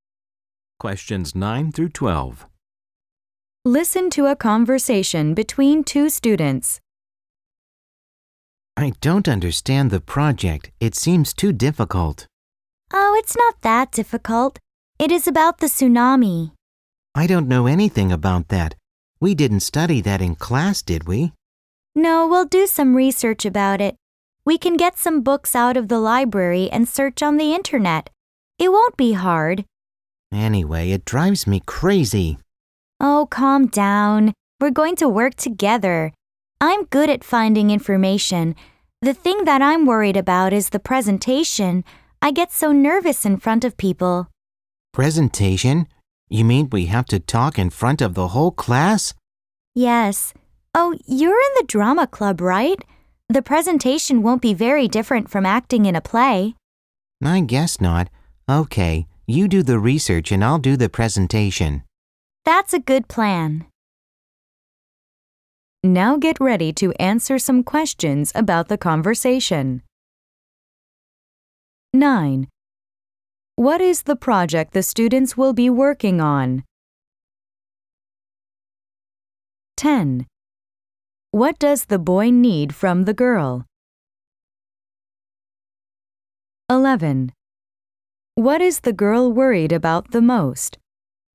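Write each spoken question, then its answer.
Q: What is the project the students will be working on?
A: A project about the tsunami

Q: What is the girl worried about the most?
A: The presentation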